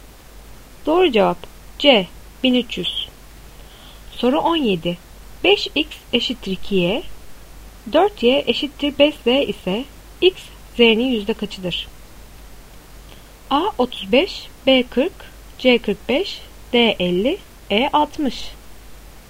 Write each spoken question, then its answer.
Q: 5x eşittir 2y, 4y eşittir 5z ise x z'nin yüzde kaçıdır?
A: Doğru cevap D 50.